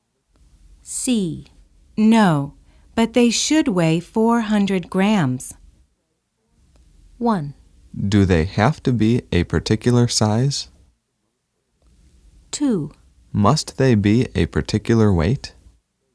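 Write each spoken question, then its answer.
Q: No, but they should weigh 400 grams.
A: 1: Do they have to be a particular size?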